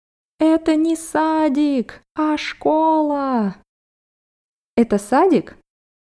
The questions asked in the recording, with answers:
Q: Это садик?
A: Нет, это школа.